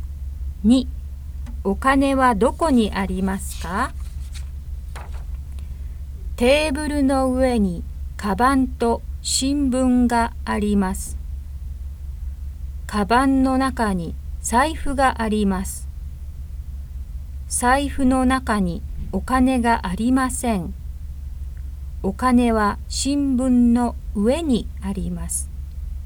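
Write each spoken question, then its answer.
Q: お金はどこにありますか?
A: 新聞の上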